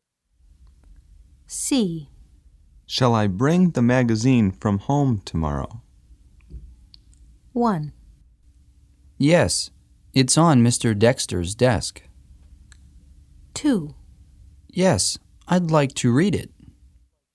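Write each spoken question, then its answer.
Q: Shall I bring the magazine from home tomorrow?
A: 2: Yes, I'd like to read it.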